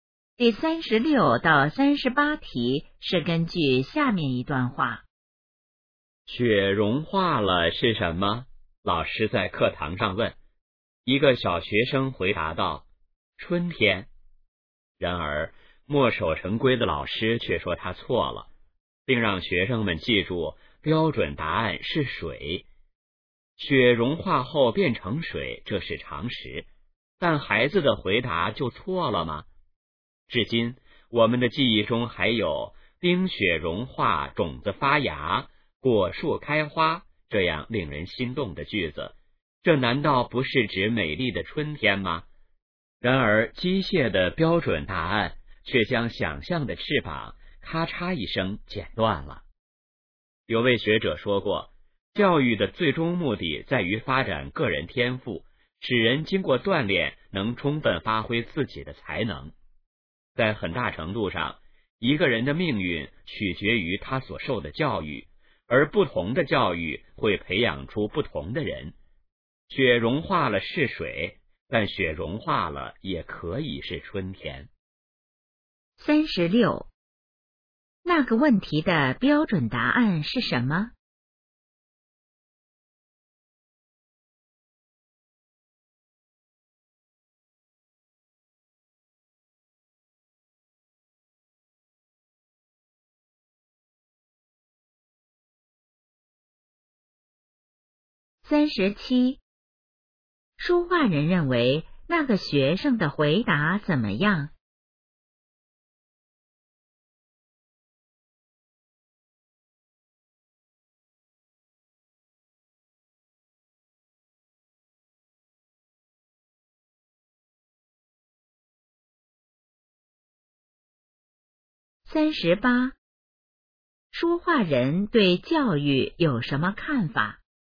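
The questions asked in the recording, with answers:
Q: 说话人认为那个学生的回答怎么样?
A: 没有错,很有想象力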